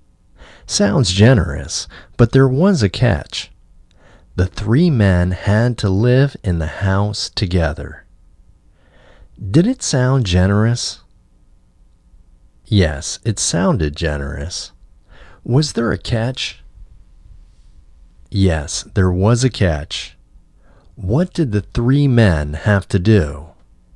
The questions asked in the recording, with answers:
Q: What did the three men have to do?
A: The three men had to live in the house together.